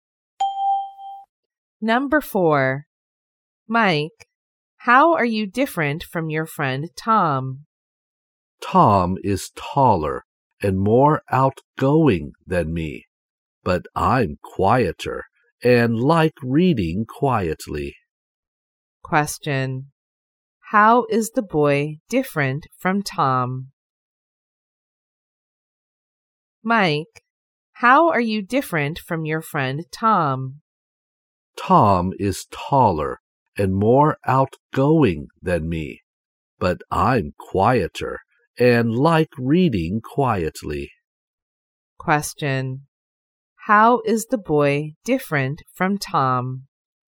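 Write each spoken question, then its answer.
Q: How is the boy different from Tom?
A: He is quieter and likes reading quietly, and Tom is taller and more outgoing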